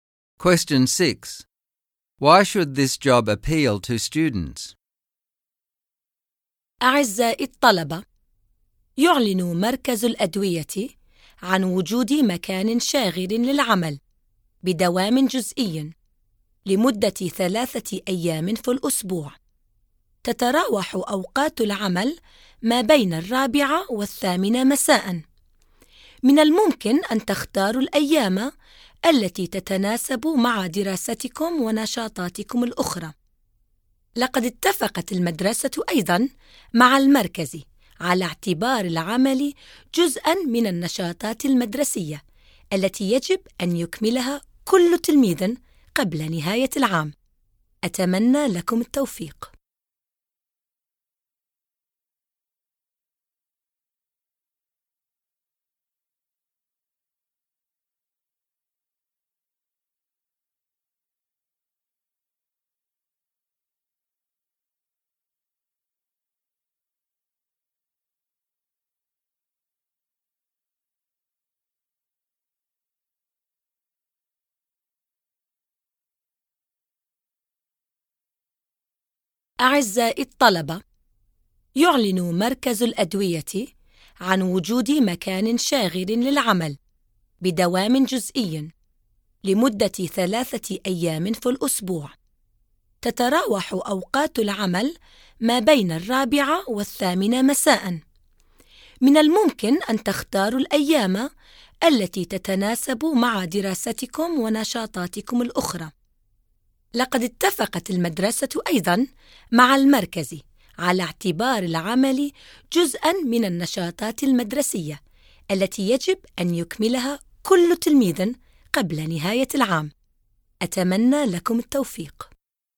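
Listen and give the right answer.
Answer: It is part-time, 4–8 pm, students choose days to fit their studies and activities, and it counts as a required school activity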